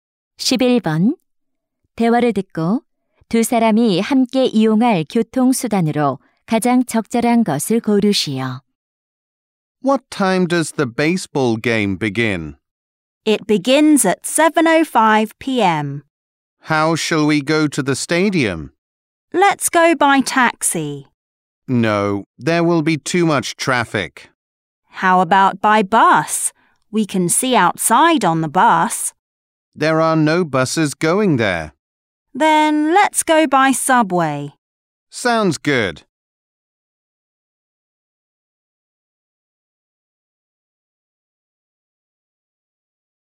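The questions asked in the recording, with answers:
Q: 대화를 듣고 두 사람이 함께 이용할 교통수단으로 가장 적절한 것을 고르시오.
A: 지하철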